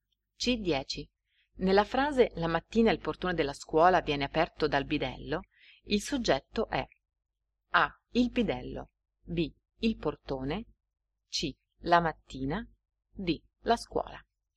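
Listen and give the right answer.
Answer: B: Il portone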